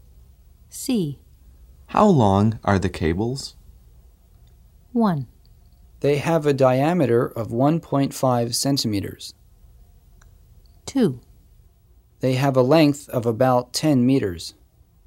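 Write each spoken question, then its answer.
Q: How long are the cables?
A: 2: They have a length of about 10 meters.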